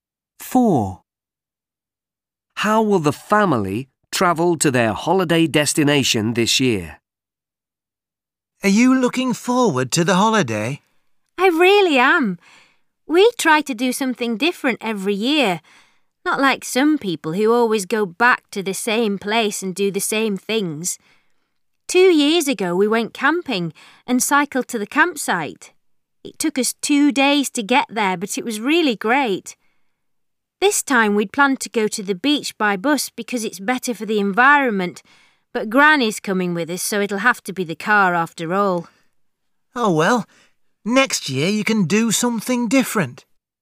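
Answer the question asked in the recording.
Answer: by car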